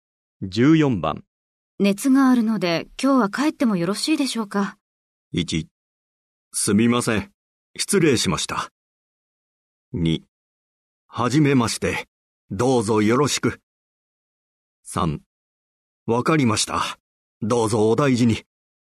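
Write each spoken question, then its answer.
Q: 熱があるので今日は帰ってもよろしいでしょうか。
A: 3: わかりました。どうぞお大事に。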